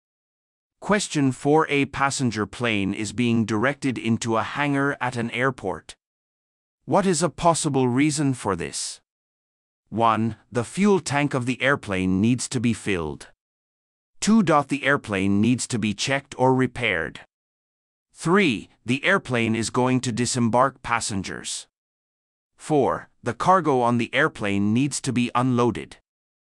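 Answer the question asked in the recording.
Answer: 2: The airplane needs to be checked or repaired.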